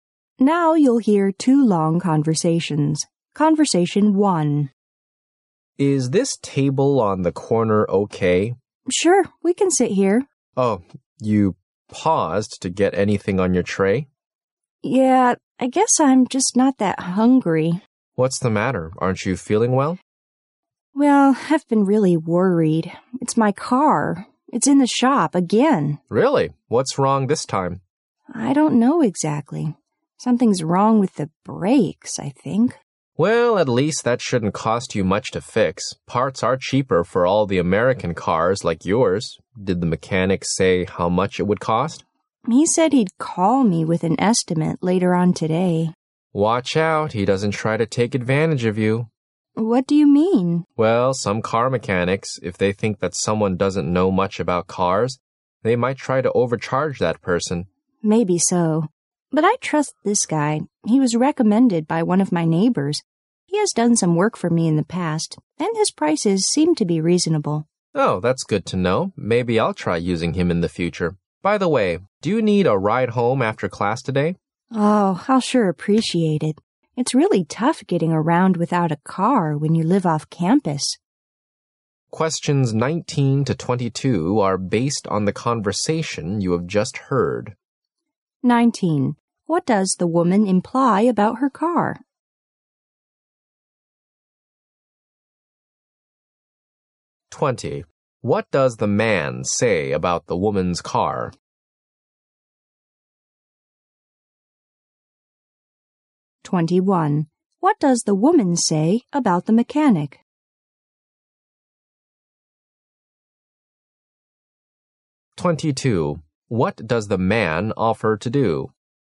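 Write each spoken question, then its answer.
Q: What does the man say about the woman's car?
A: Parts for it are cheap, so repairs shouldn't cost much

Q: What does the woman say about the mechanic?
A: She trusts him; his prices are reasonable

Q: What does the man offer to do?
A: Give her a ride home after class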